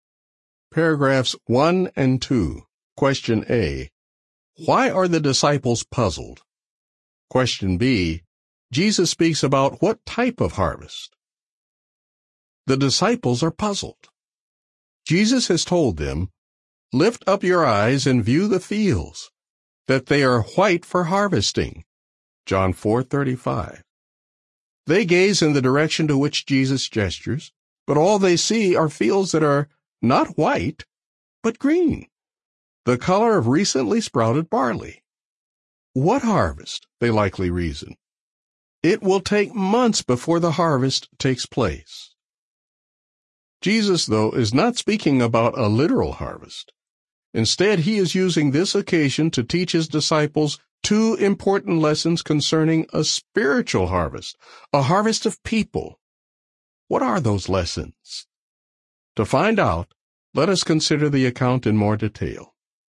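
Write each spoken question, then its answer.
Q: Why are the disciples puzzled?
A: Jesus said the fields were white for harvesting, but they saw only green fields; the harvest was months away

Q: Jesus speaks about what type of harvest?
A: A spiritual harvest, a harvest of people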